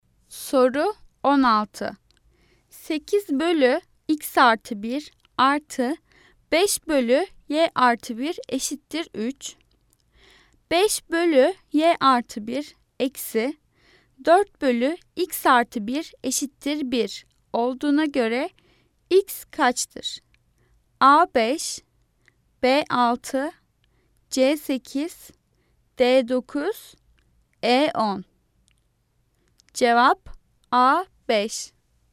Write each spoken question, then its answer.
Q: 5 bölü y artı 1 eksi 4 bölü x artı 1 eşittir 1 olduğuna göre x kaçtır?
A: Cevap A 5.